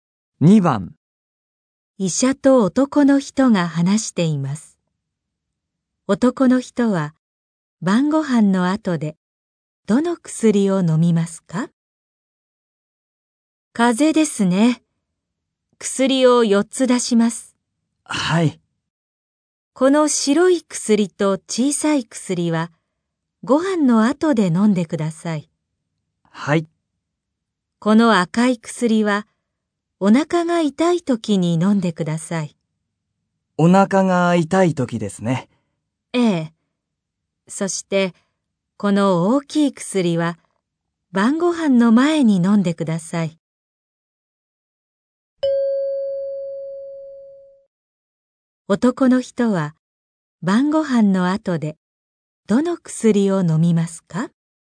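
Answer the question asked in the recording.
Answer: 白い薬と小さい薬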